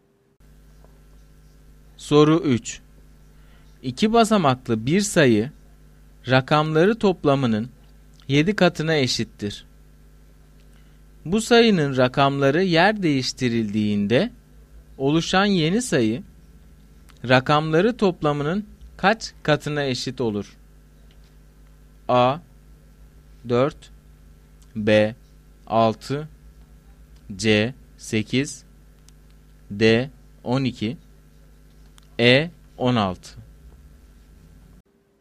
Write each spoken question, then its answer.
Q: Bu sayının rakamları yer değiştirildiğinde oluşan yeni sayı rakamları toplamının kaç katına eşit olur?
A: Doğru cevap A şıkkı.